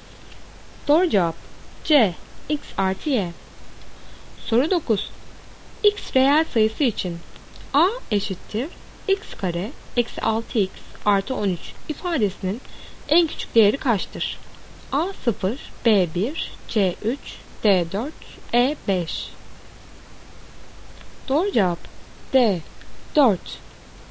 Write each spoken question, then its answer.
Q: X reel sayısı için A eşittir x kare eksi 6x artı 13 ifadesinin en küçük değeri kaçtır?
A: Doğru cevap D 4.